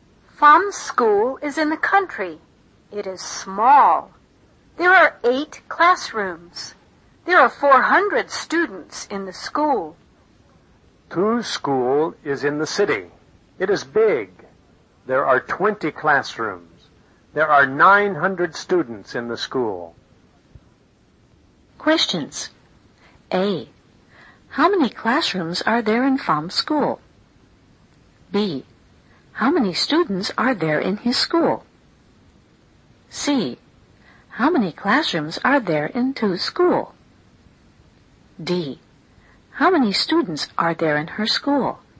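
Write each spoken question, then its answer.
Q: How many students are there in his school?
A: 400

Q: How many classrooms are there in Tu's school?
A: 20

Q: How many students are there in her school?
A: 900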